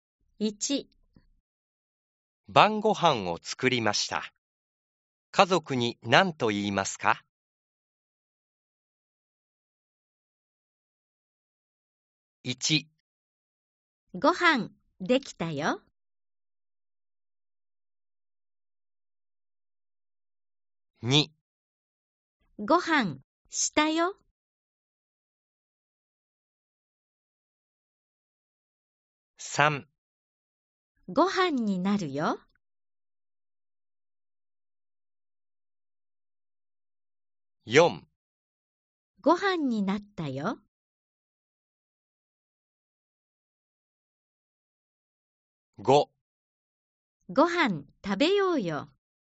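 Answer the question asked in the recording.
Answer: ○: 1 ご飯できたよ。/ 5 ご飯食べようよ。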